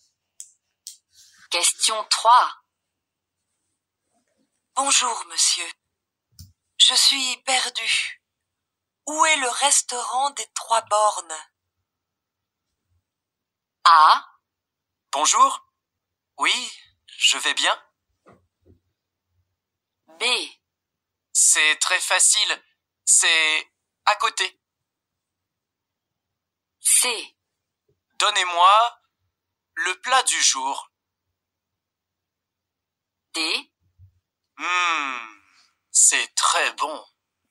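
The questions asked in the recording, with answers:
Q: Bonjour, monsieur. Je suis perdu. Où est le restaurant des Trois Bornes?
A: B: C'est très facile. C'est à côté.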